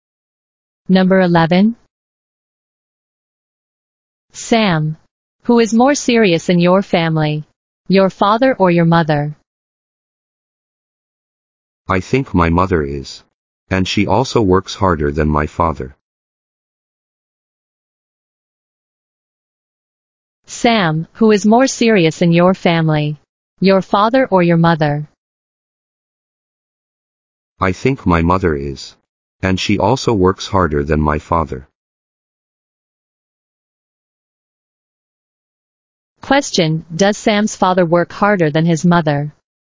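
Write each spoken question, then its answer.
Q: does Sam's father work harder than his mother?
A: No, he doesn't.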